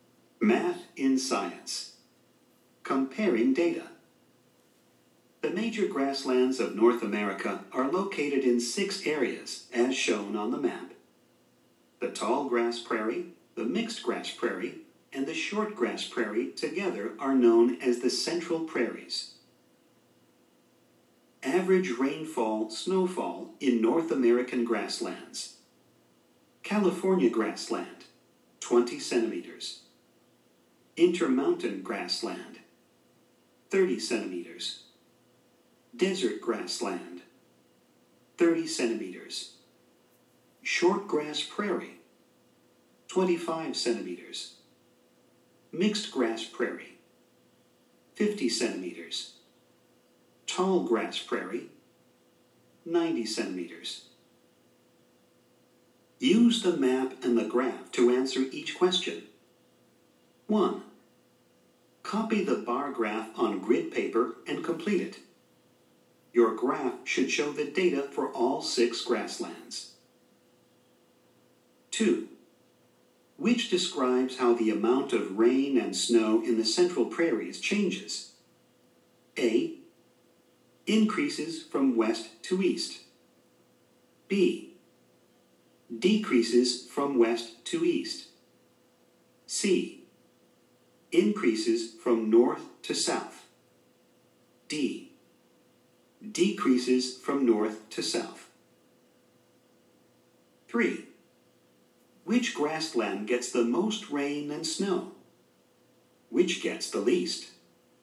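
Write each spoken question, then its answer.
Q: Which grassland gets the most rain and snow? Which gets the least?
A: Most: tall grass prairie; least: California grassland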